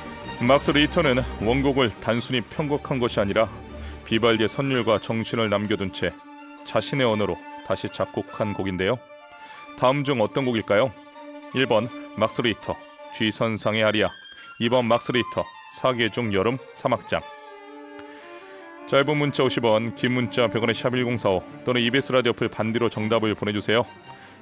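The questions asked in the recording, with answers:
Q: 다음 중 어떤 곡일까요?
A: 2: 막스 리히터, 사계 중 여름 사막장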